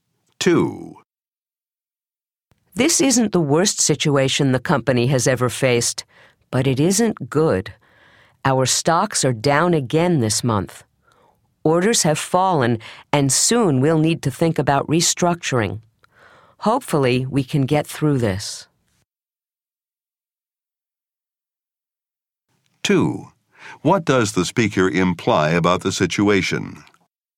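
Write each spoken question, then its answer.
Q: What does the speaker imply about the situation?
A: The company is in financial difficulty and may need restructuring, but it has faced worse.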